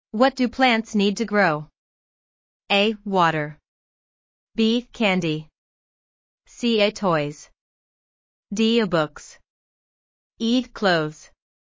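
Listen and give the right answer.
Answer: A: Water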